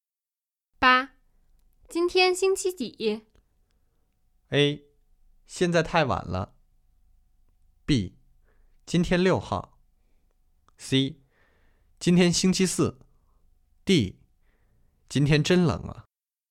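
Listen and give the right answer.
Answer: C: 今天星期四。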